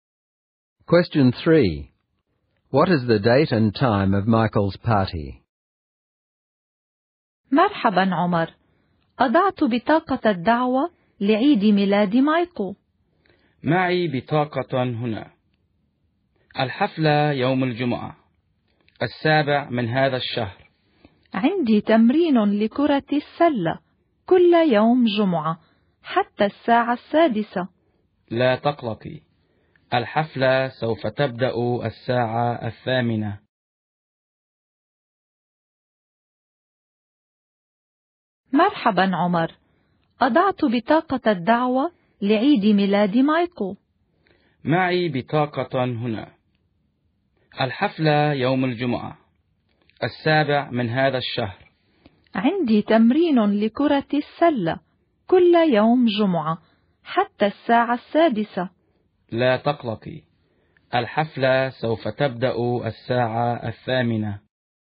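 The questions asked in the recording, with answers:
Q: What is the date and time of Michael's party?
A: Friday the 7th of this month, at 8:00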